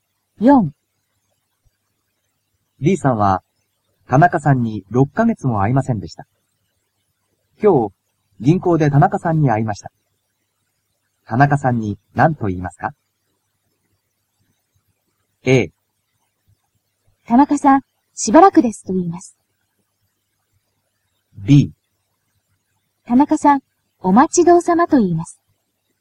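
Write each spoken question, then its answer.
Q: 田中さんに何と言いますか?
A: A: 田中さん、しばらくですと言います。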